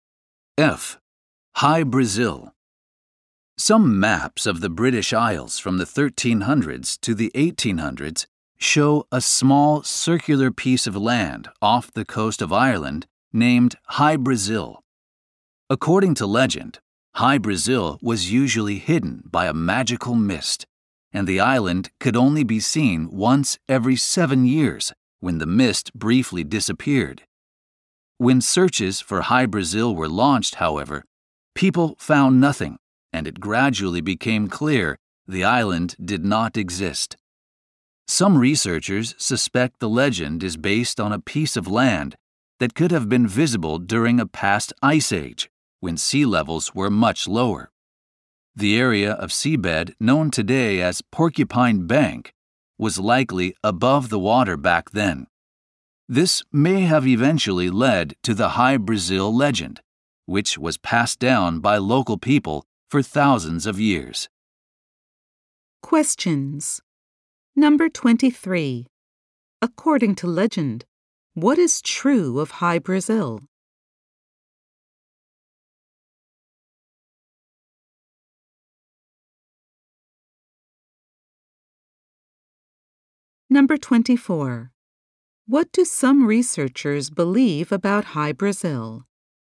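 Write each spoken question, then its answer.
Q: According to legend, what is true of High Brazil?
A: It could only be seen once every 7 years when the magical mist disappeared.

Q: What do some researchers believe about High Brazil?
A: The legend may be based on land that was visible during a past ice age, when sea levels were lower (Porcupine Bank).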